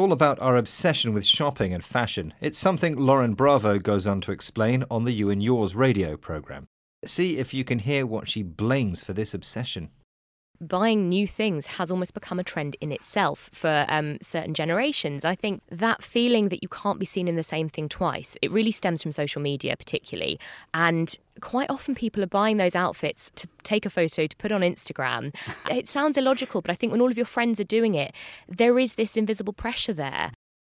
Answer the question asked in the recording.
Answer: And this idea is caused by social media.